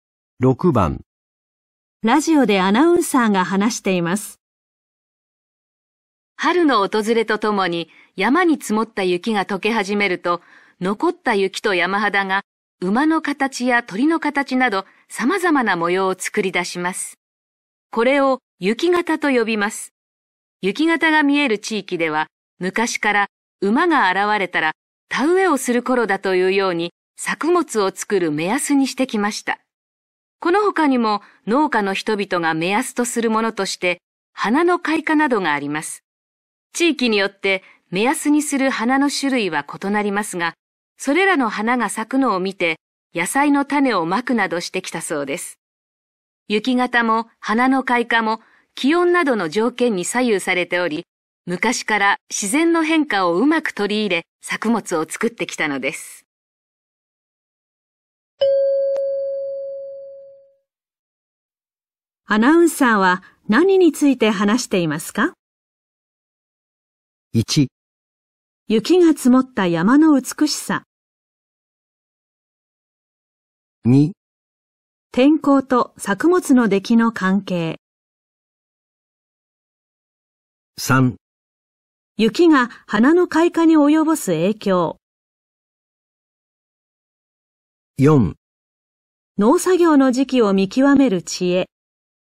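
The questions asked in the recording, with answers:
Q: アナウンサーは何について話していますか?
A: 4: 農作業の時期を見極める知恵。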